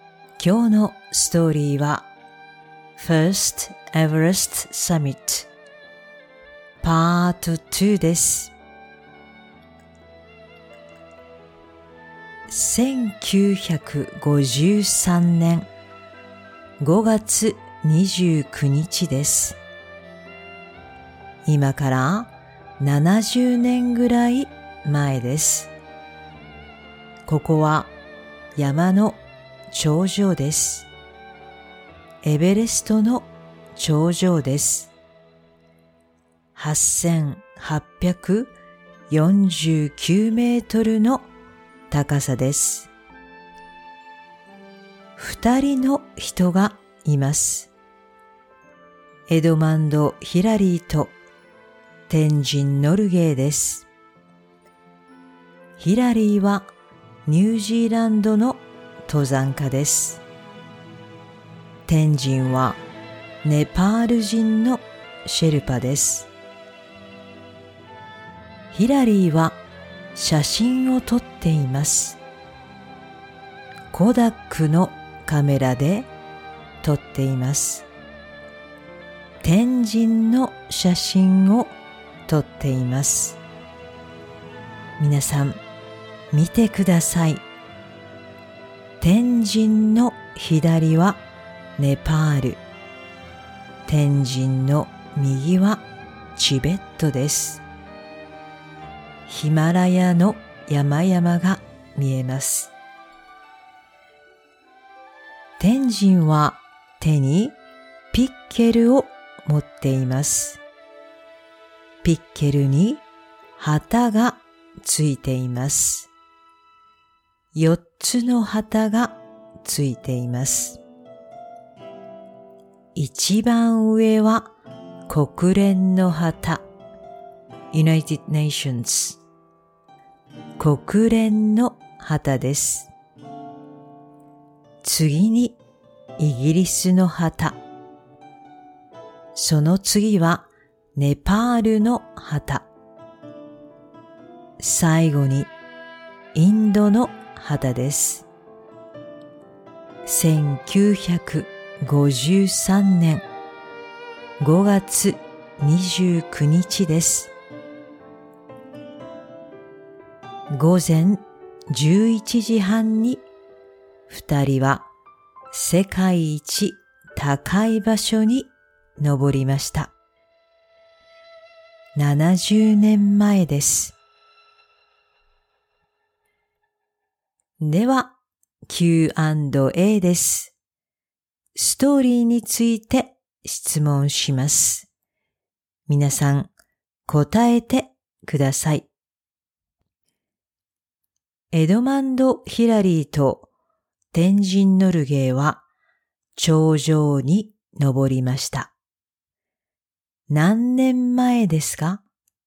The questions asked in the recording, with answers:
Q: 何年前ですか?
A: 70年前です。